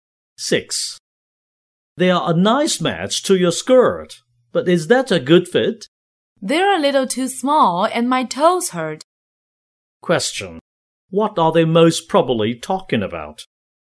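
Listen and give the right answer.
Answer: A pair of shoes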